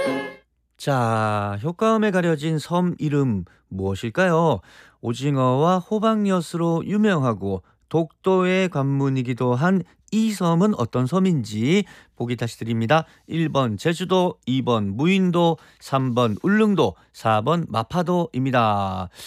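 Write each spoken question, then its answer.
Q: 자, 효과음에 가려진 섬 이름 무엇일까요?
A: 3번: 울릉도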